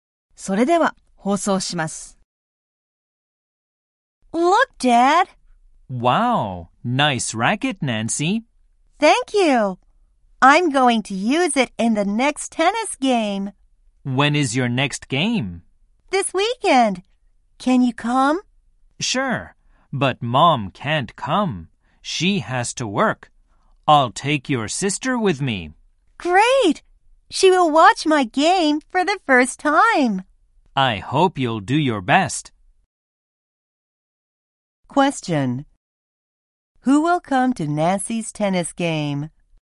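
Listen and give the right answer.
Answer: Her father and her sister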